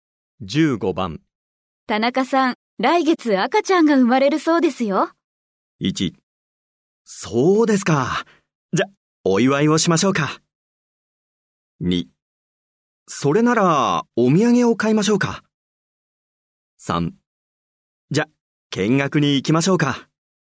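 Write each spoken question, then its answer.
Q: 田中さん、来月赤ちゃんが生まれるそうですよ。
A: 1: そうですか。じゃ、お祝いをしましょうか。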